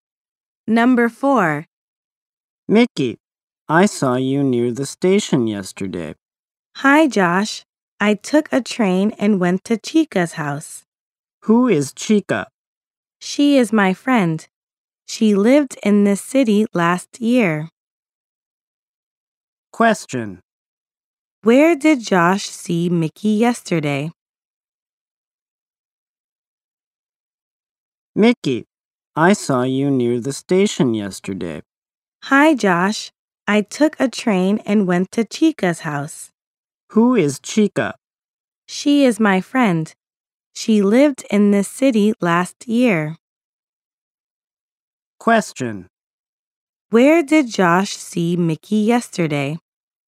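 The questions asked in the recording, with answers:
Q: Where did Josh see Mickey yesterday?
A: Near the station.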